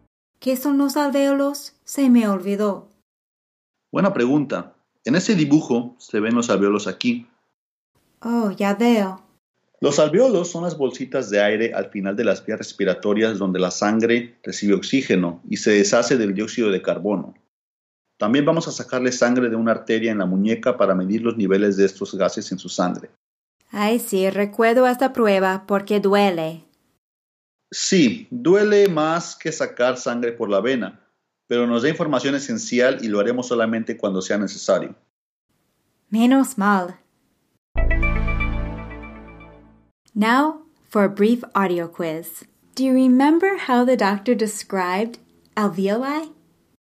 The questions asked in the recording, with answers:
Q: Do you remember how the doctor described alveoli?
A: Las bolsitas de aire, little air sacs.